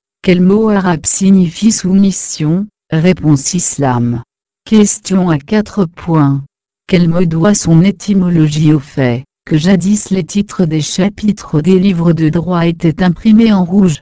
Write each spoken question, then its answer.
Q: Quel mot doit son étymologie au fait que jadis les titres des chapitres des livres de droit étaient imprimés en rouge?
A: Réponse. Rubé égale à rouge, rubrique.